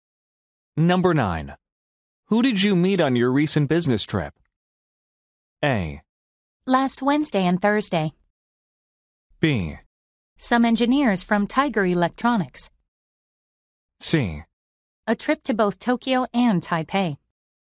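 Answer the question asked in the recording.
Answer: B: Some engineers from Tiger Electronics.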